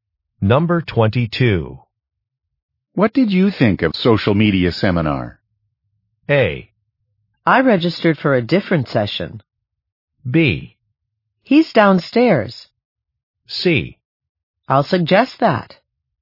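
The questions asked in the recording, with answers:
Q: What did you think of social media seminar?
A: A: I registered for a different session.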